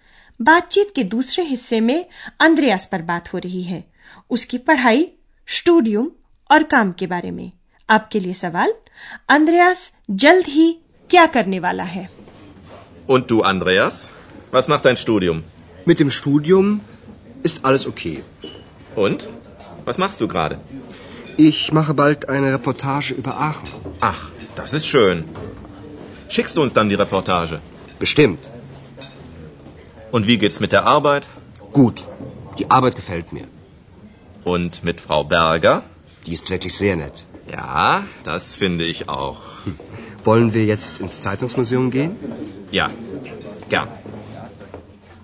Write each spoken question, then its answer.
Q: Andreas जल्द ही क्या करने वाला है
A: वह जल्द ही आखिर पर एक report तैयार करने वाला है